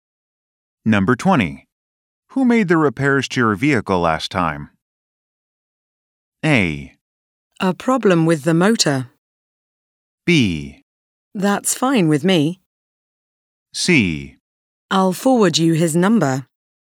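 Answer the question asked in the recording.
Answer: C: I'll forward you his number.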